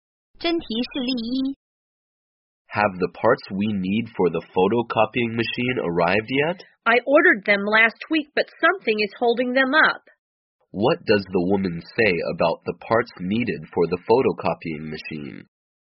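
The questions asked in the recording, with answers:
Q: What does the woman say about the parts needed for the photocopying machine?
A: They have been delayed.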